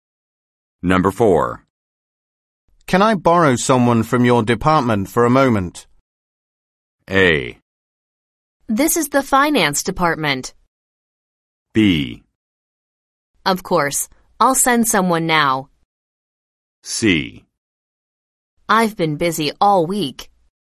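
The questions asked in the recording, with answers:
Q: Can I borrow someone from your department for a moment?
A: B: Of course. I'll send someone now.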